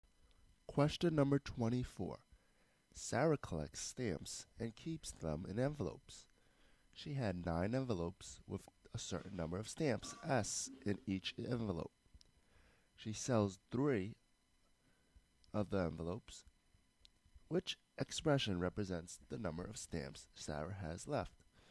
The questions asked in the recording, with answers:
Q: Which expression represents the number of stamps Sarah has left?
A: So our answer choice will be answer choice H, 9S minus 3S.